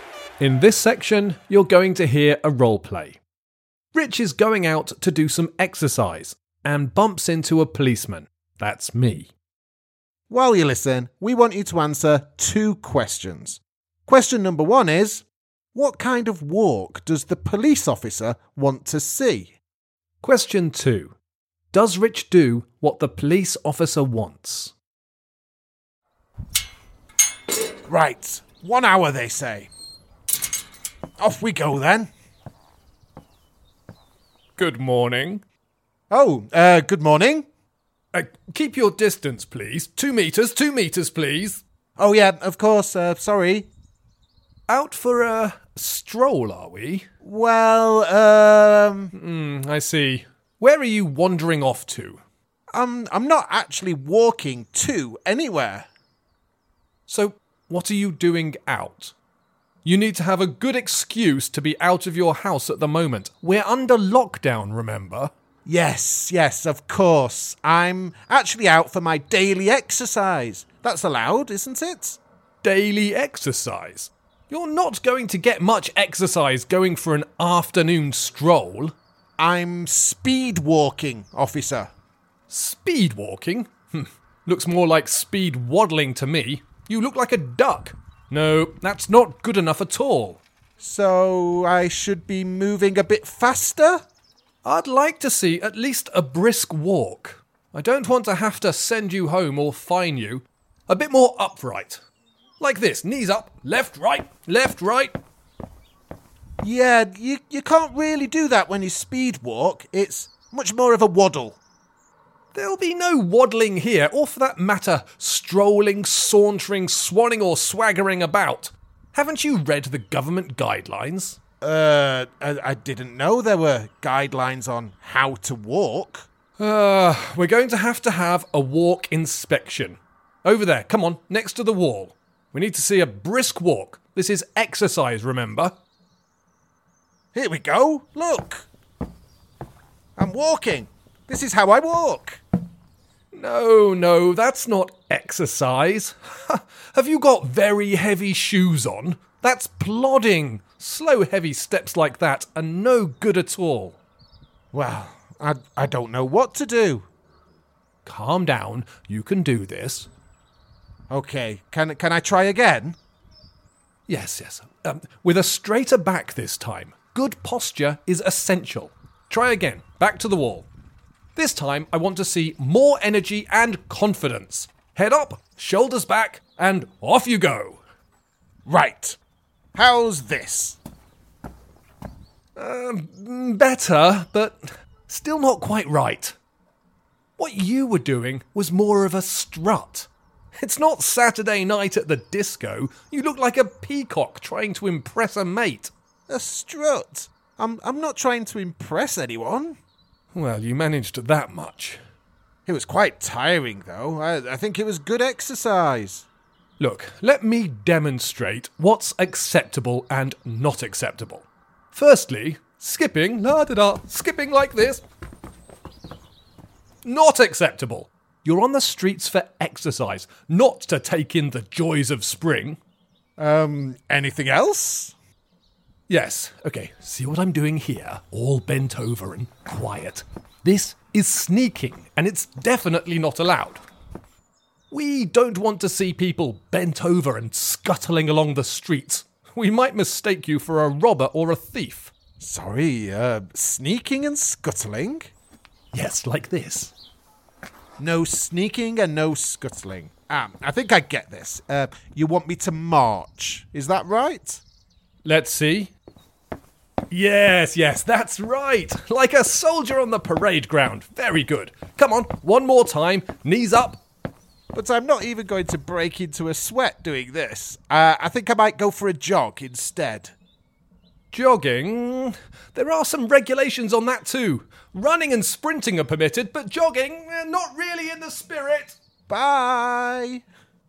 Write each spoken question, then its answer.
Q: what kind of walk does the police officer want to see?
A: I wanted Rich to march, like a soldier.